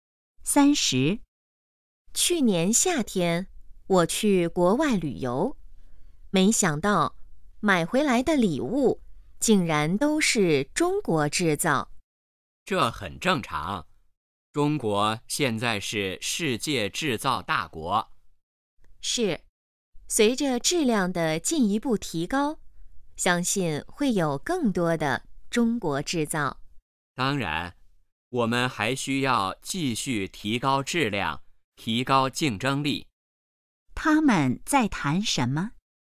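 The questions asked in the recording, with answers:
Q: 他们在谈什么?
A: 中国制造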